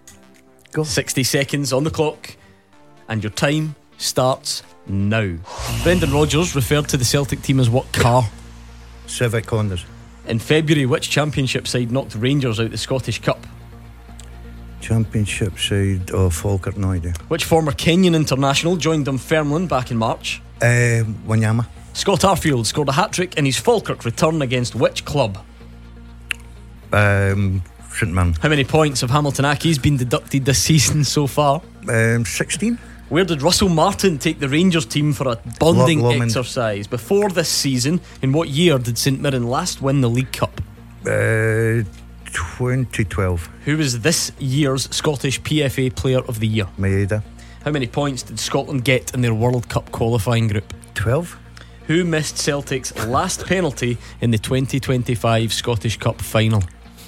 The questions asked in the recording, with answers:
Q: Brendan Rodgers referred to the Celtic team as what car?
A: Brendan Rodgers referred to his Celtic team as a Honda Civic.

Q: Which former Kenyan international joined Dunfermline back in March?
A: The former Kenyan international who joined Dunfermline back in March was, of course, Victor Wanyama.

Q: Who was this year's Scottish PFA Player of the Year?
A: Daizen Maeda, a runaway winner.